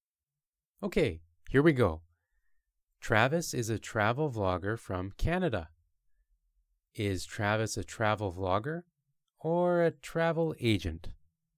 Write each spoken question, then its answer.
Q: Is Travis a travel vlogger or a travel agent?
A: Travis is a travel vlogger.